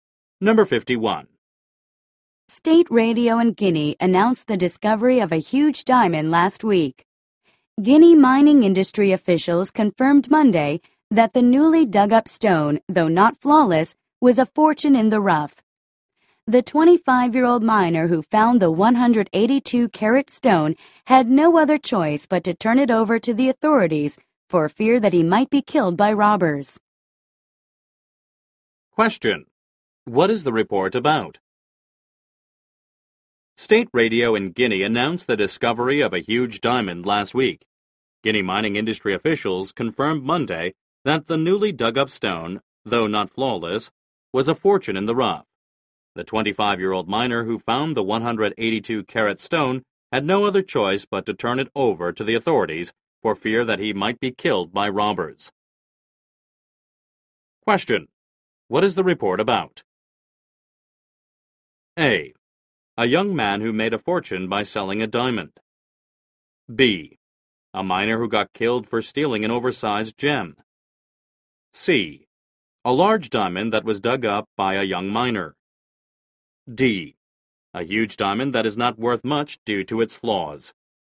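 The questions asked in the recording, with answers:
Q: What is the report about?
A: C: A large diamond that was dug up by a young miner.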